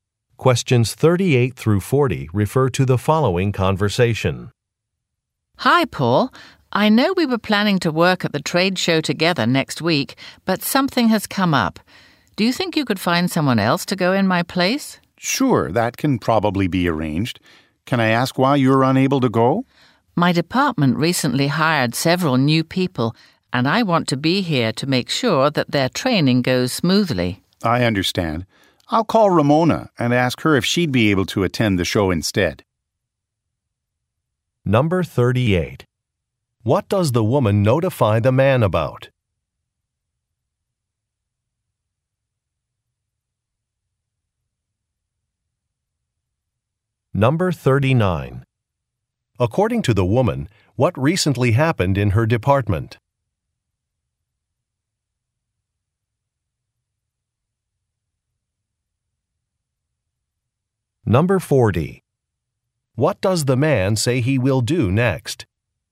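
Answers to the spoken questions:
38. She can't go to the trade show
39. Several new people were hired
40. Call Ramona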